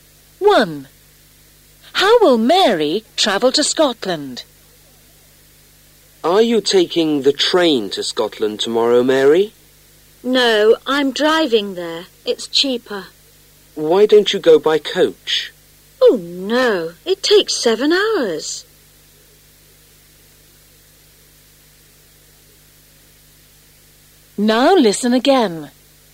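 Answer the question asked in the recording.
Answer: By car (she's driving)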